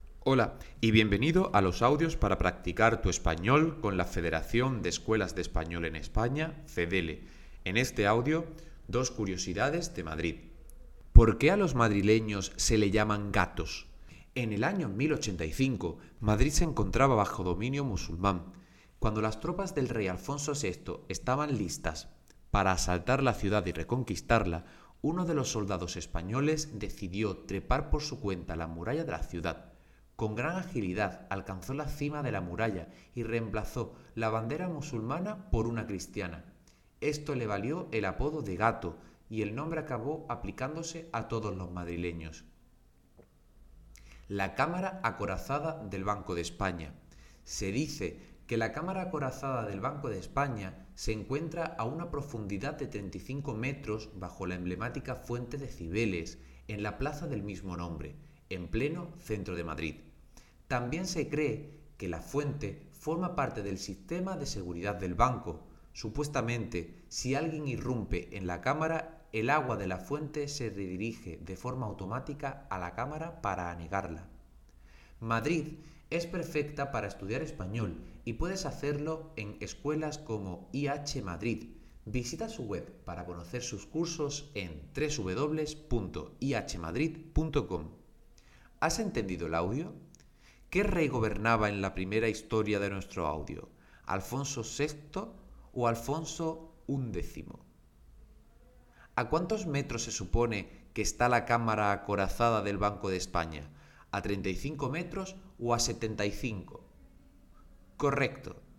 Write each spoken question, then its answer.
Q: ¿Qué rey gobernaba en la primera historia de nuestro audio?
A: Y en nuestra primera historia, el rey era Alfonso VI.

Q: ¿A cuántos metros se supone que está la cámara acorazada del Banco de España?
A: La cámara acorazada del Banco de España se encuentra a 35 metros.